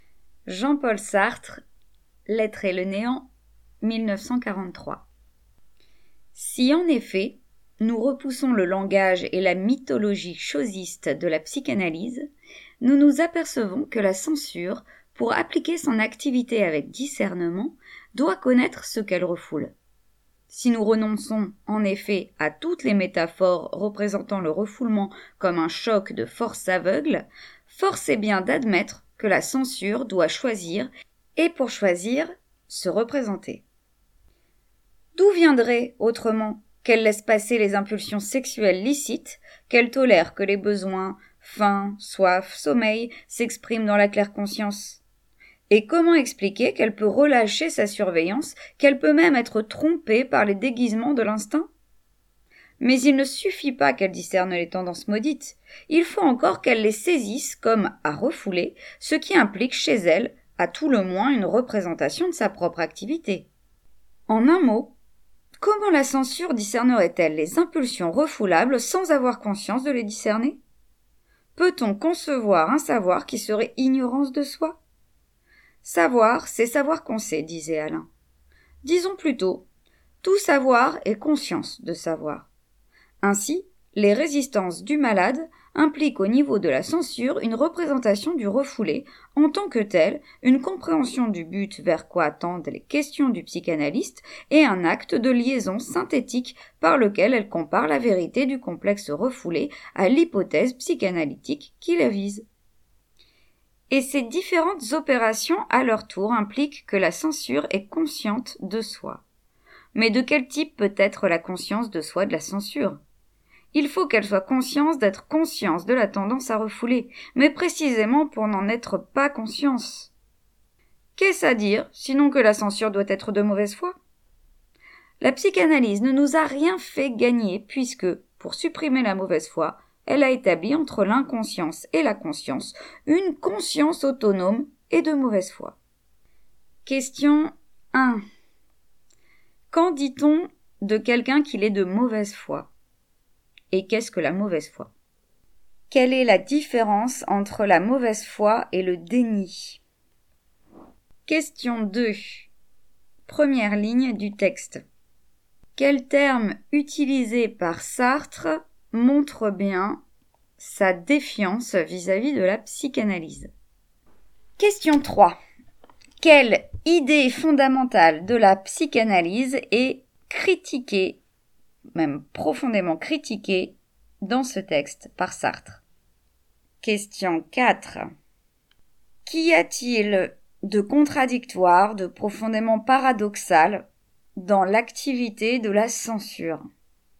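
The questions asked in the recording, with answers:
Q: Quel terme utilisé par Sartre montre bien sa défiance vis-à-vis de la psychanalyse?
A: « chosiste » (la mythologie chosiste de la psychanalyse)

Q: Qu'y a-t-il de contradictoire, de profondément paradoxal dans l'activité de la censure?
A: Elle doit avoir conscience de ce qu'elle refoule pour ne pas en être consciente : savoir et ignorer à la fois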